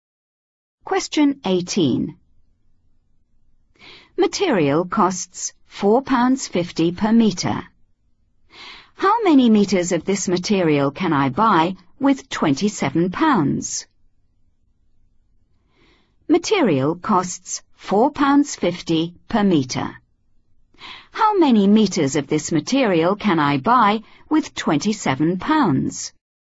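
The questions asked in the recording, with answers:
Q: How many meters of this material can I buy with £27?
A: 6 m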